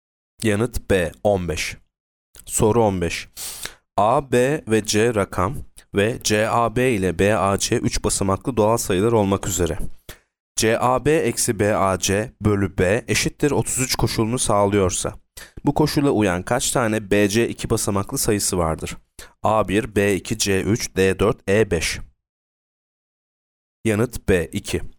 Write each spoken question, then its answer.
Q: CAB eksi BAC bölü B eşittir 33 koşulunu sağlıyorsa, bu koşula uyan kaç tane BC 2 basamaklı sayısı vardır?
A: Yanıt B 2.